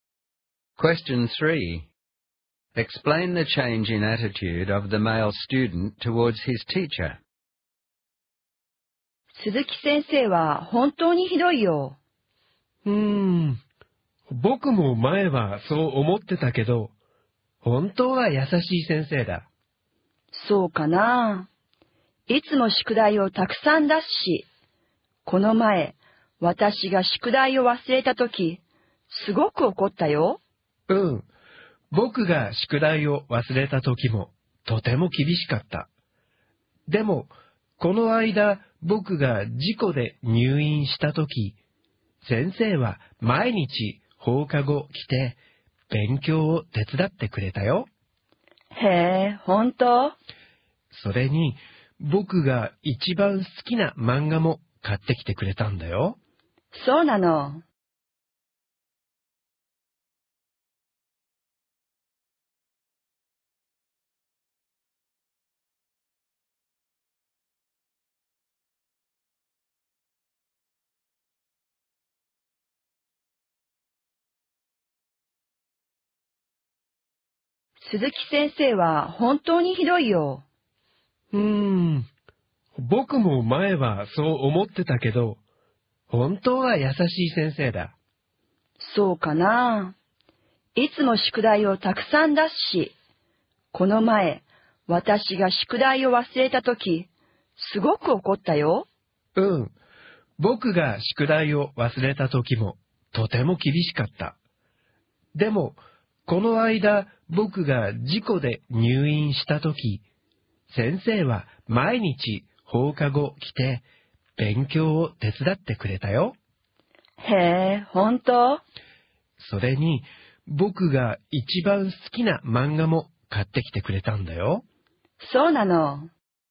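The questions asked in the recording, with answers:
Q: Explain the change in attitude of the male student towards his teacher.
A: He used to think the teacher was strict and mean, but now thinks she is kind because she visited him every day after school when he was in hospital, helped him study and bought him his favourite manga.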